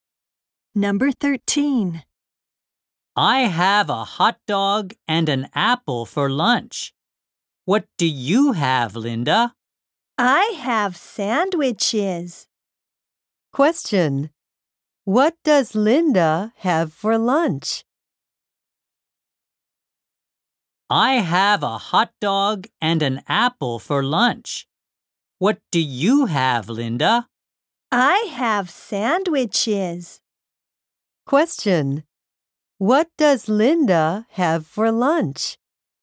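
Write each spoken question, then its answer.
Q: What does Linda have for lunch?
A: Sandwiches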